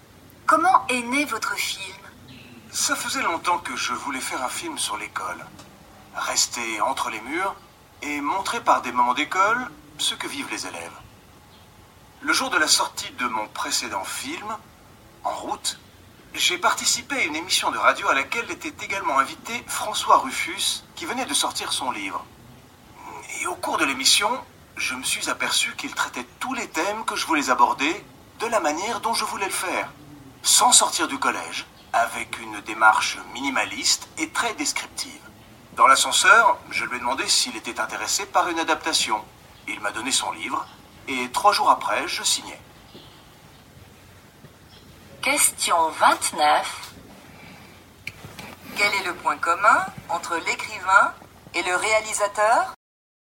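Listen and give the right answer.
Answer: Ils voulaient traiter les mêmes thèmes sur l'école de la même manière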